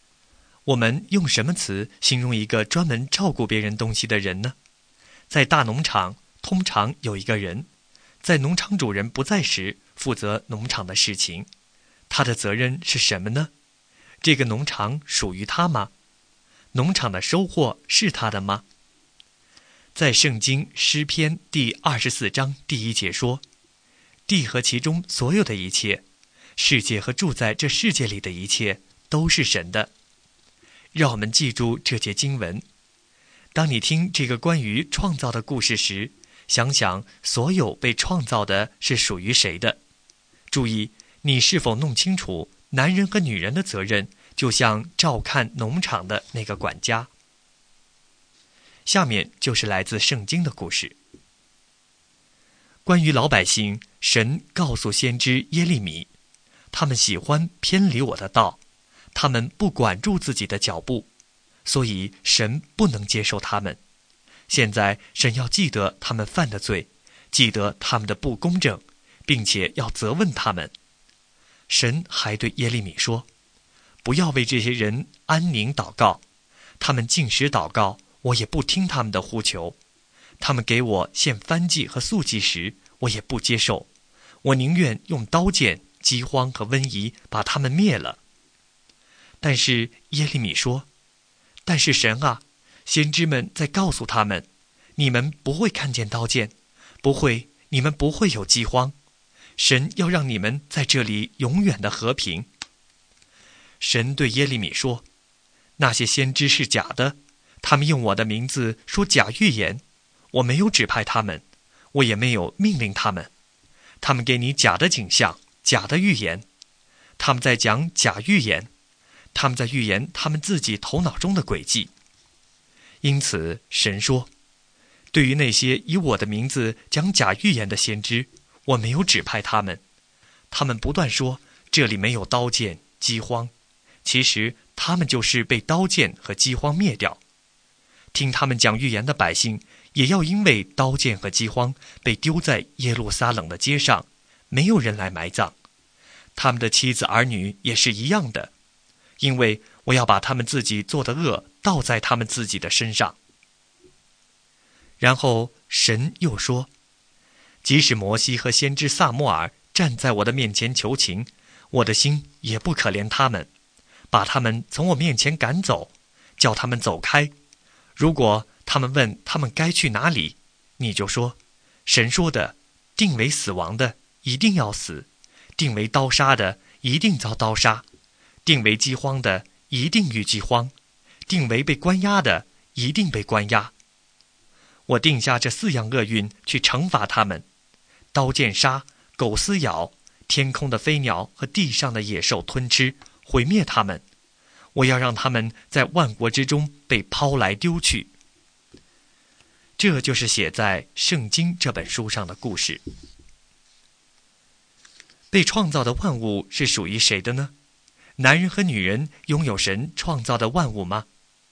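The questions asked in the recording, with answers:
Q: 被创造的万物是属于谁的呢?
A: 属于神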